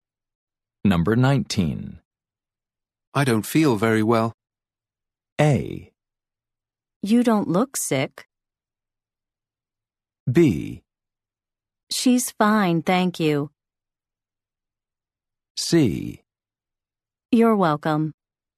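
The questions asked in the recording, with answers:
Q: I don't feel very well.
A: A: You don't look sick.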